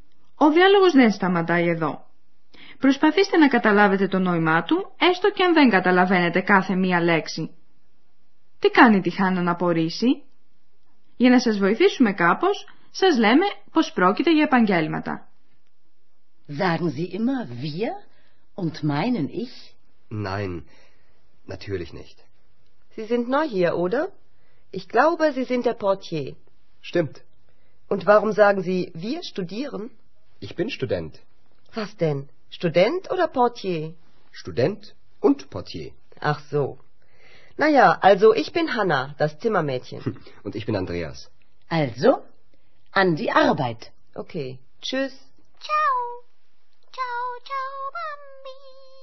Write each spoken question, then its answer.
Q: Τι κάνει τη Χάννα να απορρίσει?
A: Η Χάννα παραξενεύεται όταν ο Ανδρέας λέει πως είναι φοιτητής, αφού προηγουμένως είχε συμφωνήσει μαζί της πως είναι θηρορός.